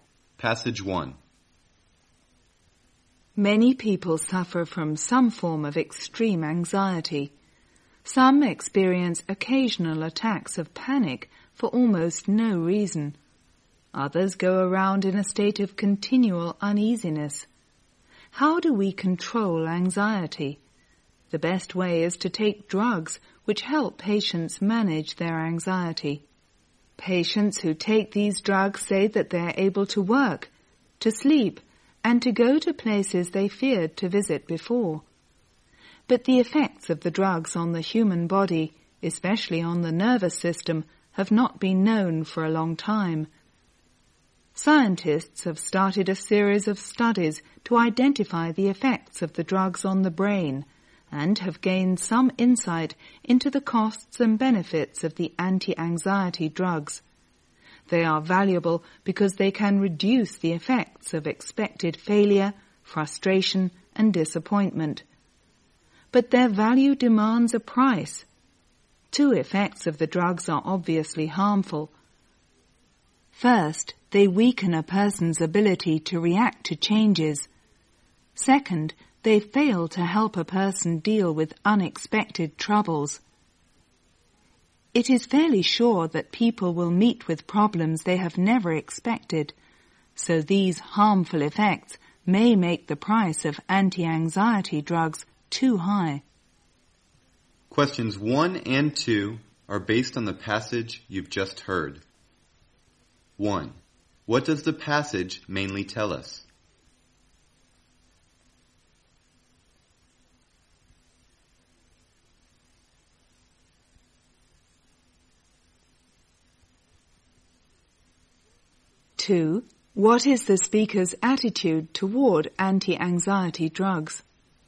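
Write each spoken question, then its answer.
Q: What does the passage mainly tell us?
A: The benefits and harmful effects of anti-anxiety drugs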